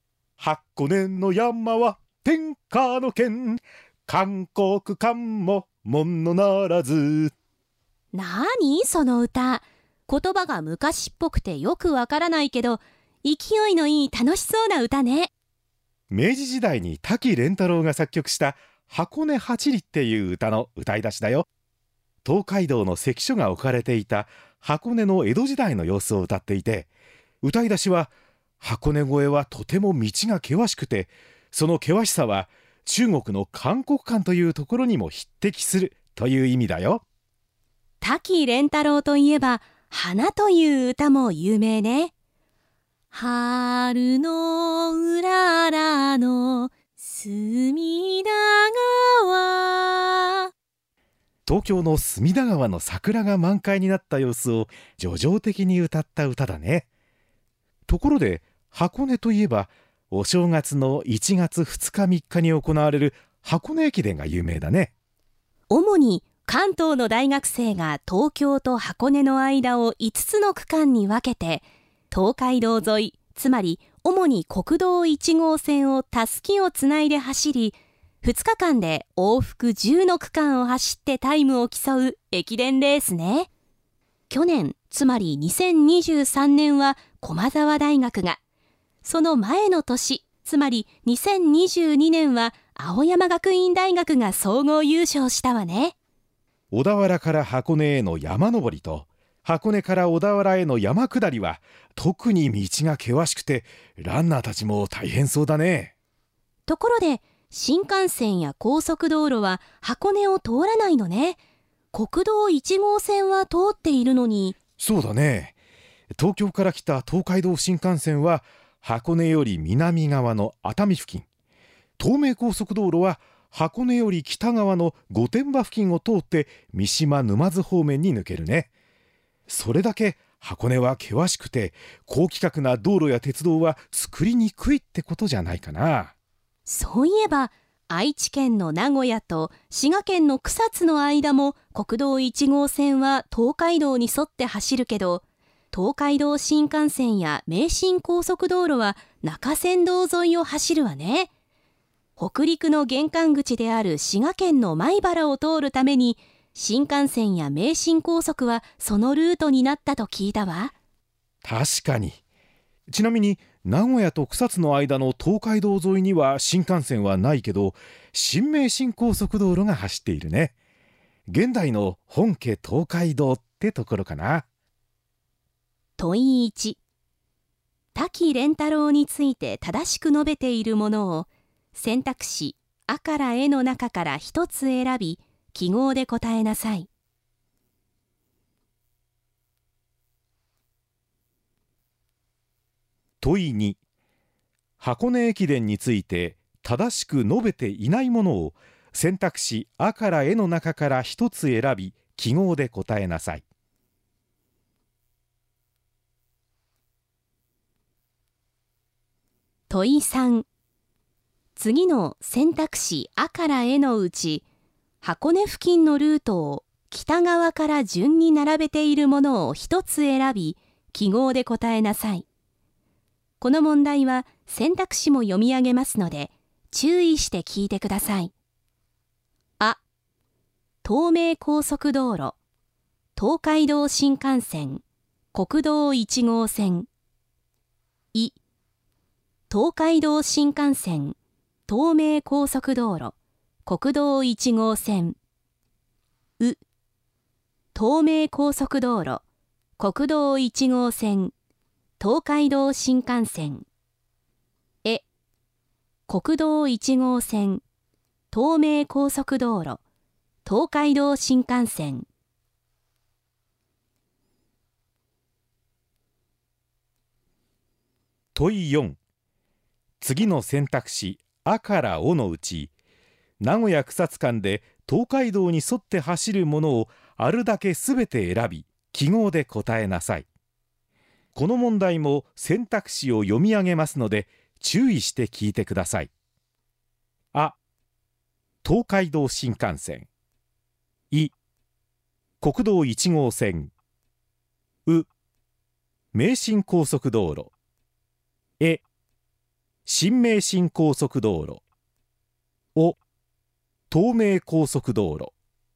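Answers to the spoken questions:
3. う: 東名高速道路、国道1号線、東海道新幹線
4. い: 国道1号線、え: 新名神高速道路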